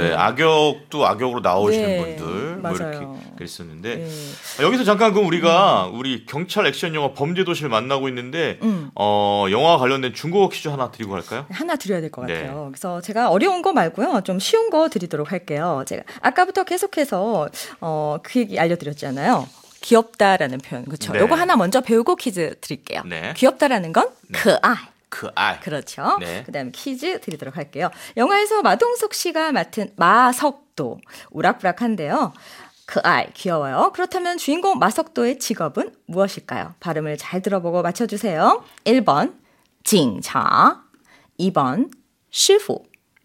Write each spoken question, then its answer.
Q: 그렇다면 주인공 마석도의 직업은 무엇일까요?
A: 정답은 바로 1번, 징차.